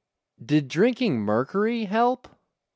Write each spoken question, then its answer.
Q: Did drinking mercury help?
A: No, drinking mercury didn't help.